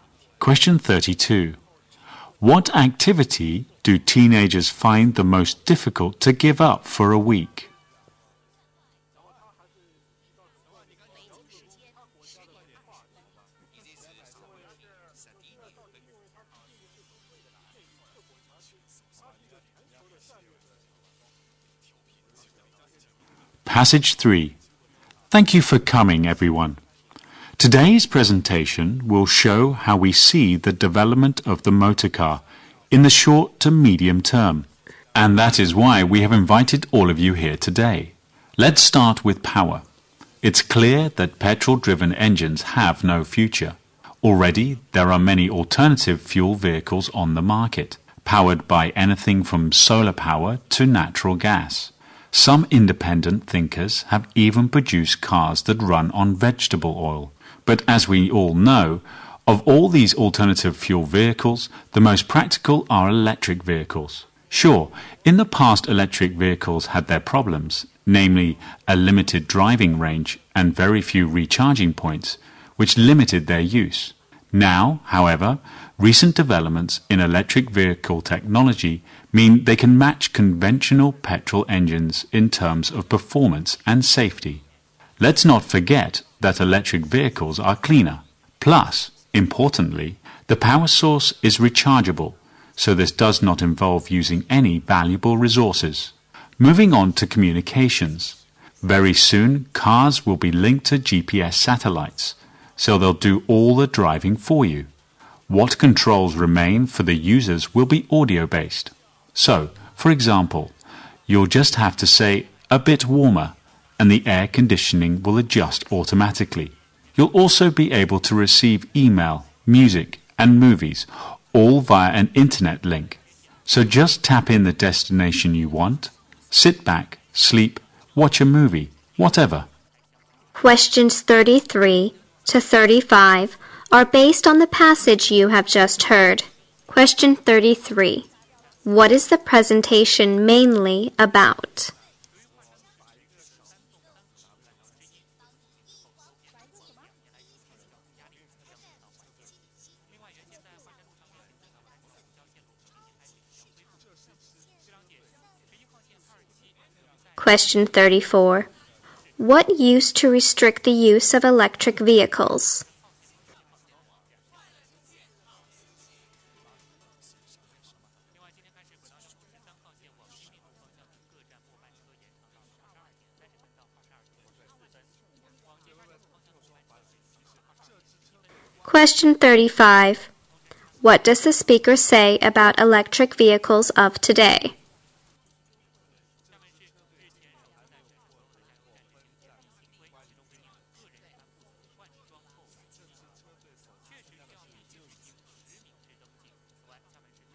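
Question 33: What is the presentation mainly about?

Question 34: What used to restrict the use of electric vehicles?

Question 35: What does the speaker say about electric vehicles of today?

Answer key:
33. The development of the motor car in the short to medium term.
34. Limited driving range and very few recharging points.
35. They can match petrol engines in performance and safety.

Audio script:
31. What books are most popular among teenagers according to the survey?
32. What activity do teenagers find the most difficult to give up for a week?
Thank you for coming, everyone. Today's presentation will show how we see the development of the motor car in the short to medium term, and that is why we have invited all of you here today. Let's start with power. It's clear that petrol-driven engines have no future. Already there are many alternative fuel vehicles on the market, powered by anything from solar power to natural gas. 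Some independent thinkers have even produced cars that run on vegetable oil. But as we all know, of all these alternative fuel vehicles, the most practical are electric vehicles. Sure, in the past electric vehicles have their problems, namely, a limited driving range, and very few recharging points, which limited their use. Now, however, recent developments in electric vehicle technology mean they can match conventional petrol engines in terms of performance and safety. Let's not forget that electric vehicles are cleaner. Plus, importantly, the power source is rechargeable, so this does not involve using any valuable resources. Moving on to communications, very soon, cars will be linked to GPS satellites, so they'll do all the driving for you. What controls remain for the users will be audio-based, so, for example, you'll just have to say "a bit warmer", and the air conditioning will adjust automatically. 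You'll also be able to receive email, music and movies, all via an internet link. So just type in the destination you want, sit back, sleep, watch your movie, whatever.
Questions 33-35 are based on the passage you have just heard.

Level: 英语四级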